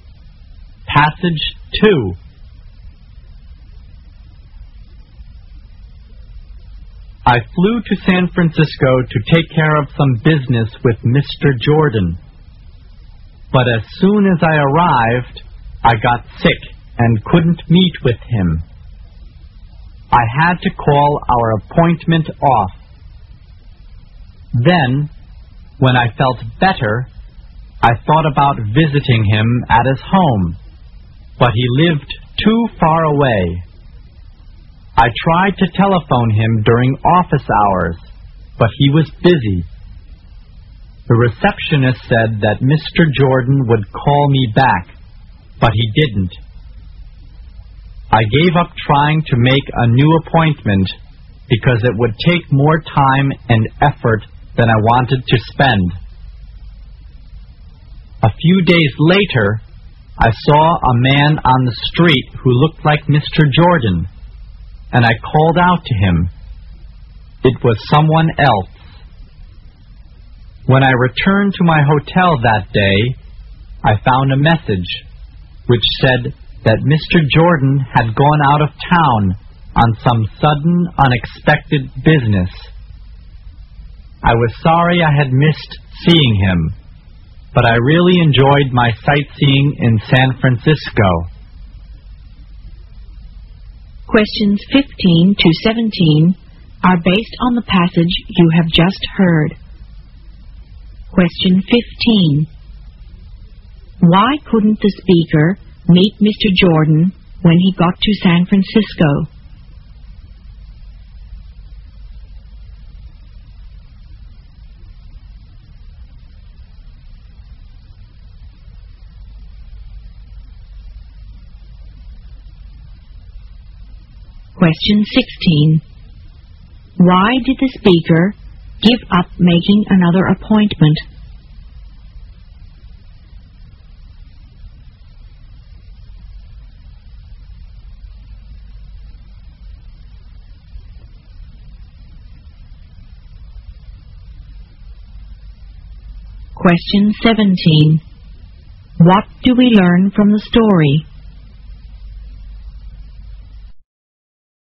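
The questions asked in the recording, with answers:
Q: Why couldn't the speaker meet Mr. Jordan when he got to San Francisco?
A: He got sick.

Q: Why did the speaker give up making another appointment?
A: It would take more time and effort than he wanted to spend.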